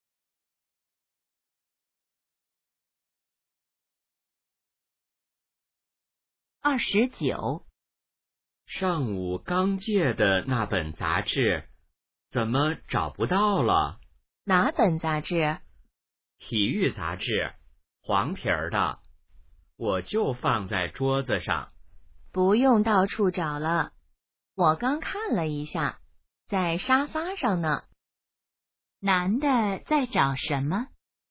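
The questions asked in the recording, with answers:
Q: 男的在找什么?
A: 体育杂志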